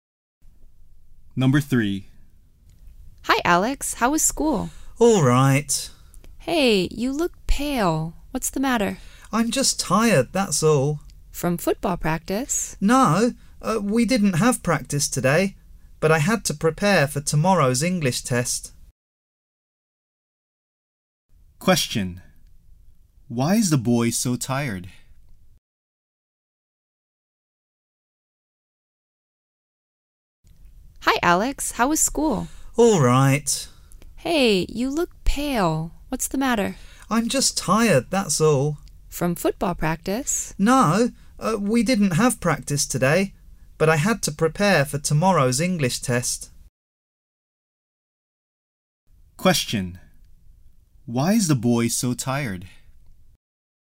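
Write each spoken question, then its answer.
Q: Why is the boy so tired?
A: He had to prepare for tomorrow's English test.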